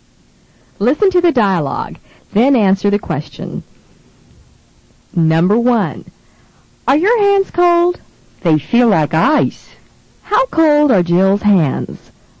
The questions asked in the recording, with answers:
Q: How cold are Jill's hands?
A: They're as cold as ice.